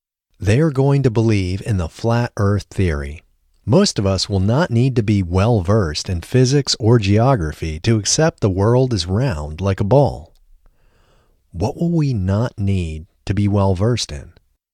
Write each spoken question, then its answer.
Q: What will we not need to be well-versed in?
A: We will not need to be well-versed in physics or geography.